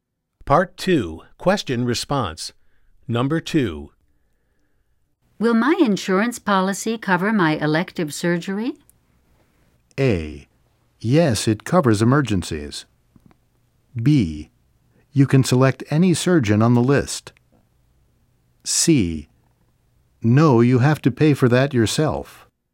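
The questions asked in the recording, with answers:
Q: Will my insurance policy cover my elective surgery?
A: C: No, you have to pay for that yourself.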